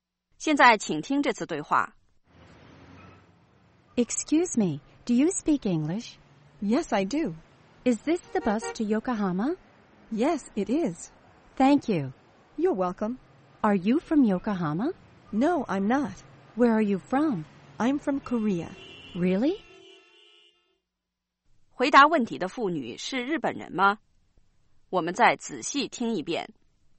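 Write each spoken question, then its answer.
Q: 回答问题的妇女是日本人吗?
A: 不是,她来自韩国。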